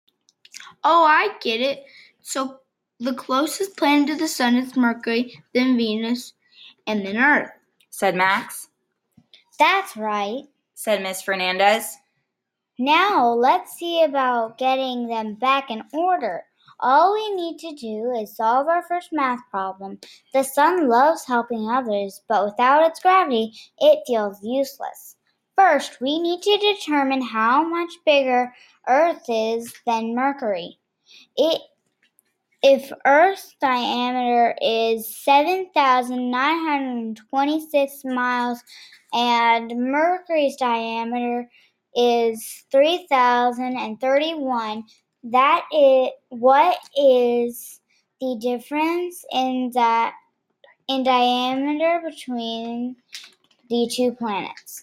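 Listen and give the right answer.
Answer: 4,895 miles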